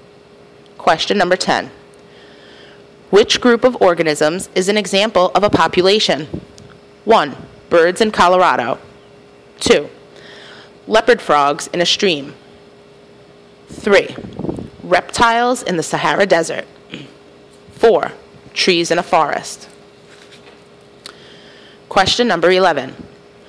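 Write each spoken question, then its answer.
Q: Which group of organisms is an example of a population?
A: 2: Leopard frogs in a stream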